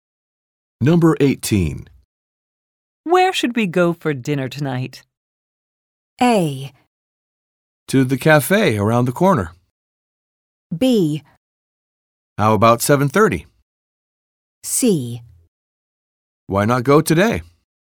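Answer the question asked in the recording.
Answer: A: To the cafe around the corner.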